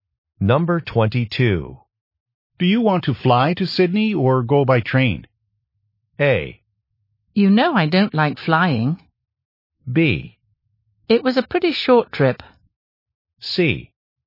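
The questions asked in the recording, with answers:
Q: Do you want to fly to Sydney or go by train?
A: A: You know I don't like flying.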